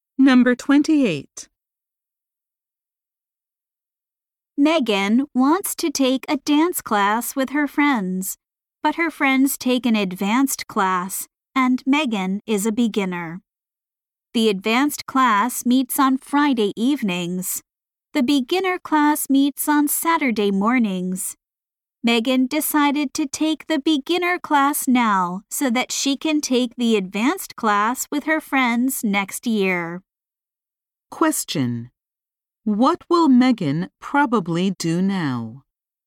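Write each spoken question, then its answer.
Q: What will Megan probably do now?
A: Take the beginner class on Saturday mornings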